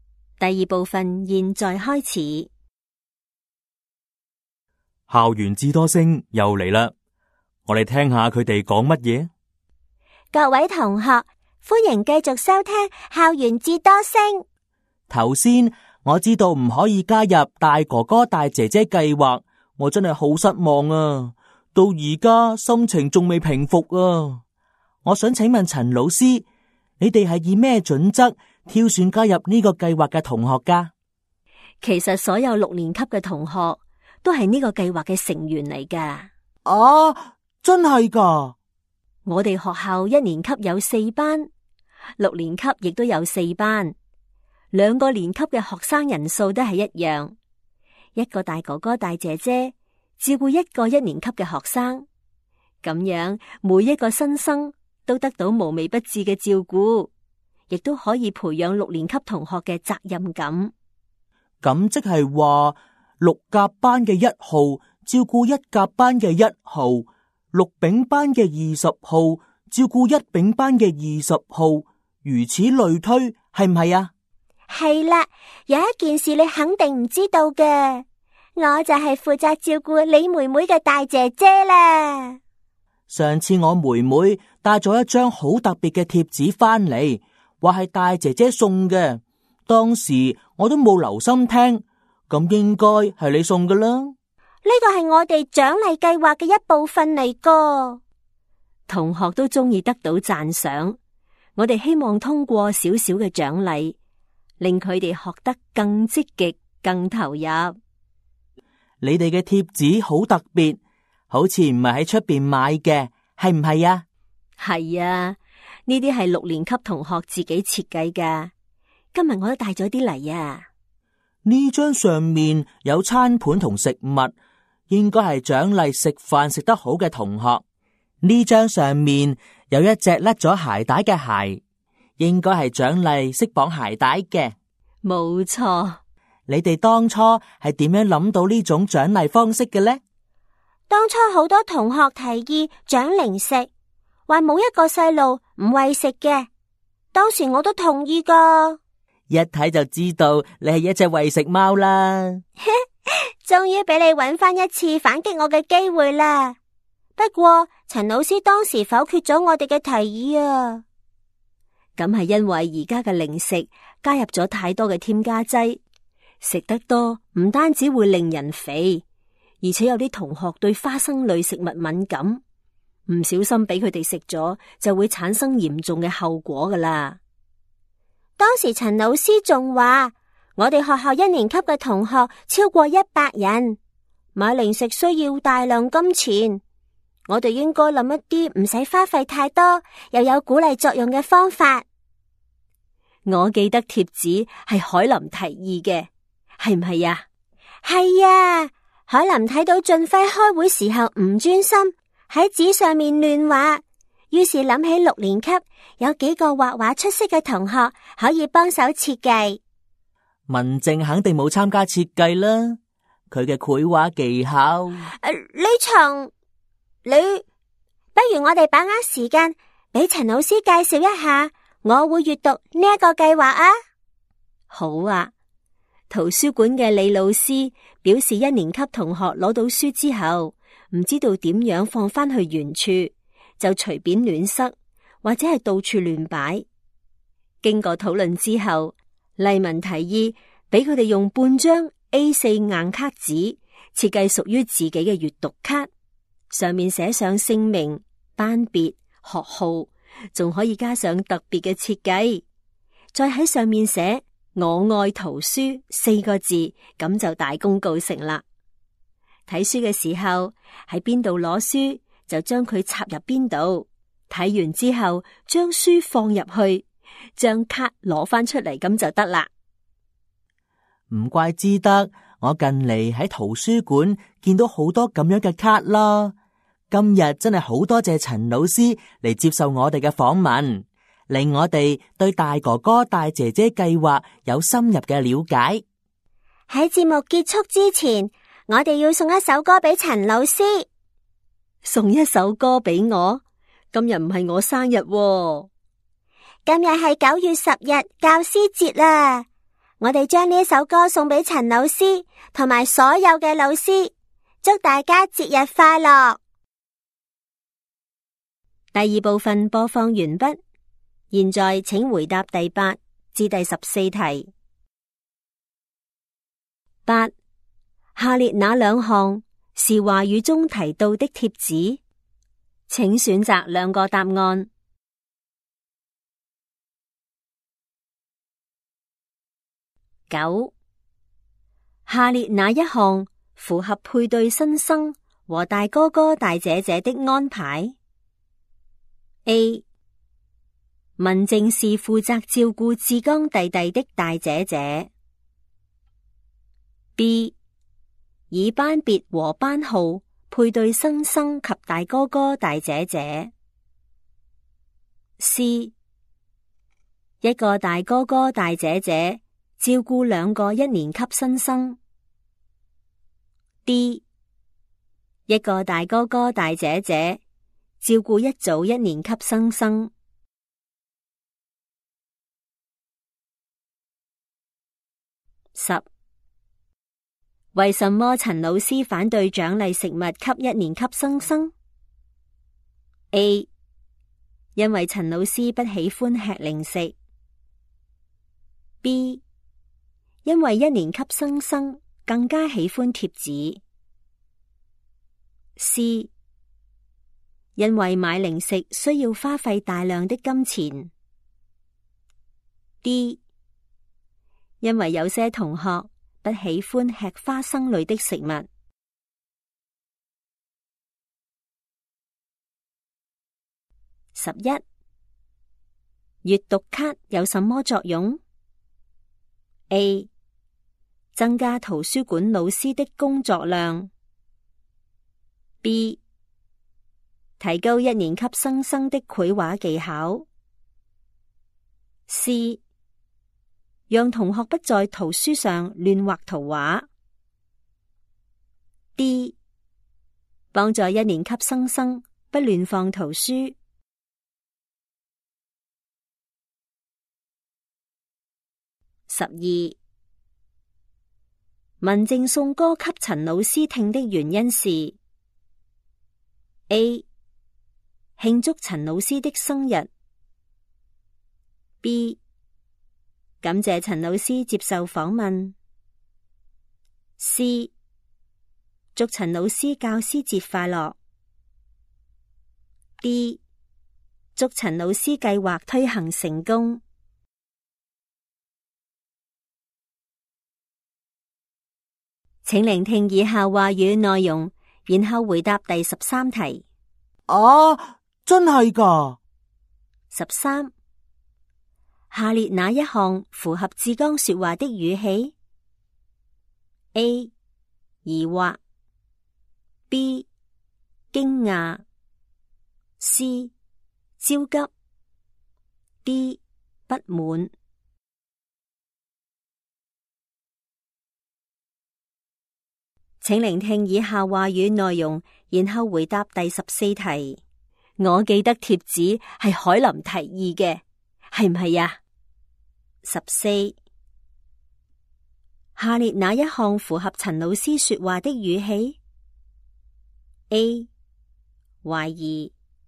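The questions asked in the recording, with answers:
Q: 下列哪一项符合配对新生和大哥哥大姐姐的安排?A. 文静是负责照顾志刚弟弟的大姐姐。 B. 以班别和班号配对新生及大哥哥大姐姐。 C. 一个大哥哥大姐姐照顾两个一年级新生。 D. 一个大哥哥大姐姐照顾一组一年级新生。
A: B: 以班别和班号配对新生及大哥哥大姐姐

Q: 为什么陈老师反对奖励食物给一年级新生? A. 因为陈老师不喜欢吃零食。 B. 因为一年级新生更加喜欢贴纸。 C. 因为买零食需要花费大量的金钱。 D. 因为有些同学不喜欢吃花生类的食物。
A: C: 因为买零食需要花费大量的金钱

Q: 阅读卡有什么作用? A. 增加图书馆老师的工作量。 B. 提高一年级新生的绘画技巧。 C. 让同学不在图书上乱画图画。 D. 帮助一年级新生不乱放图书。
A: D: 帮助一年级新生不乱放图书

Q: 文静送歌给陈老师听的原因是 A. 庆祝陈老师的生日。 B. 感谢陈老师接受访问。 C. 祝陈老师教师节快乐。 D. 祝陈老师计划推行成功。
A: C: 祝陈老师教师节快乐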